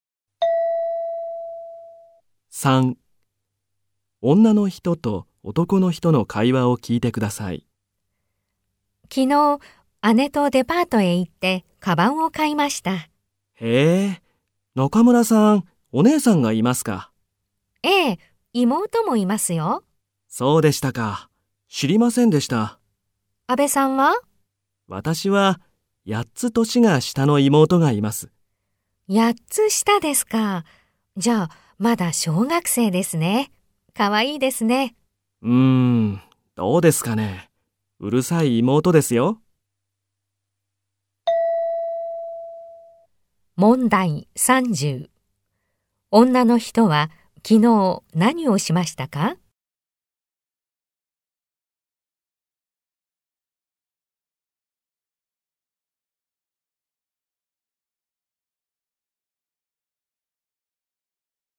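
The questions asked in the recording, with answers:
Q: 女の人は昨日何をしましたか?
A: 姉とデパートへ行ってカバンを買いました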